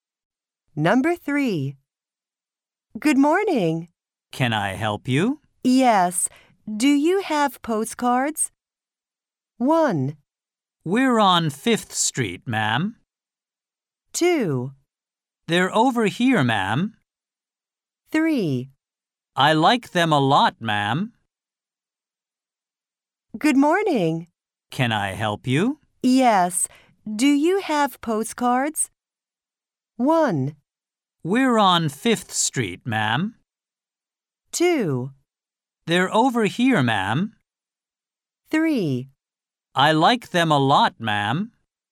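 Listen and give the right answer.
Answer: 2: They're over here, ma'am.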